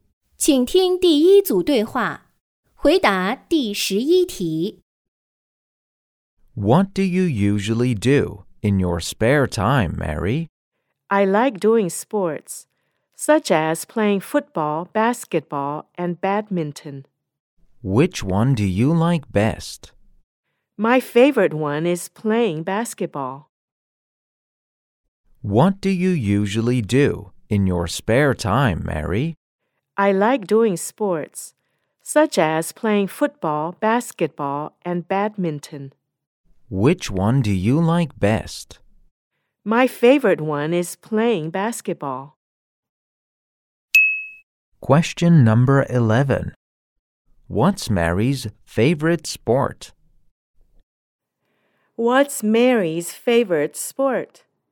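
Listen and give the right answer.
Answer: Basketball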